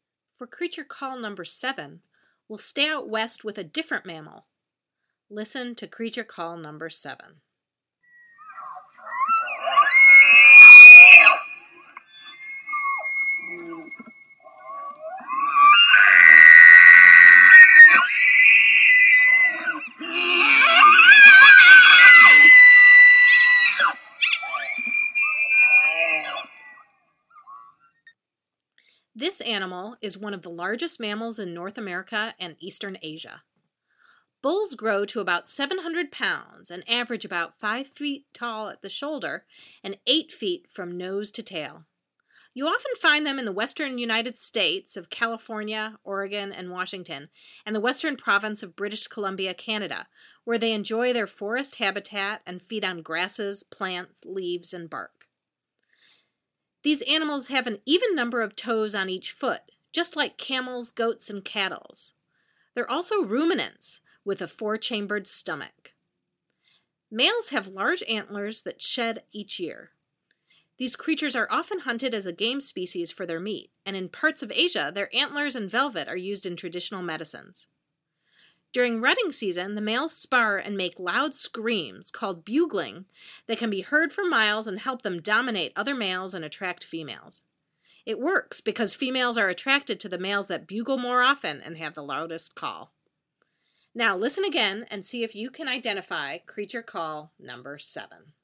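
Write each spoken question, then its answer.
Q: Now listen again and see if you can identify creature call number 7.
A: elk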